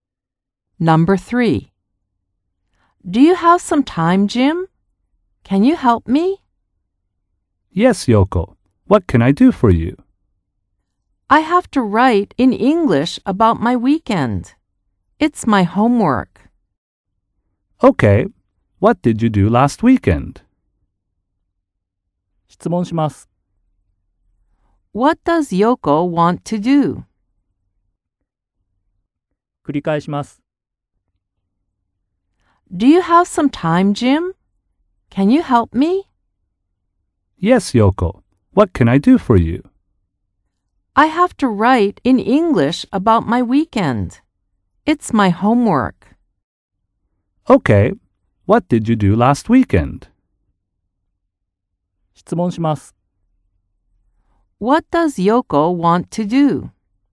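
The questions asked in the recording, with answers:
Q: What does Yoko want to do?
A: Write in English about her weekend for homework.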